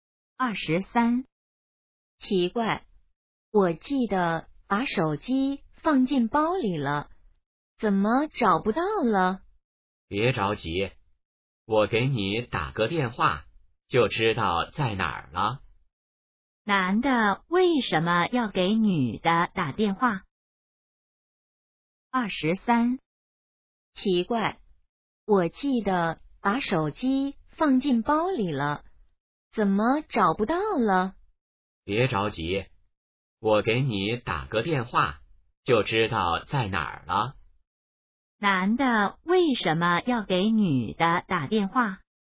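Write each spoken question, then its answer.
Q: 男的为什么要给女的打电话?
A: 帮她找手机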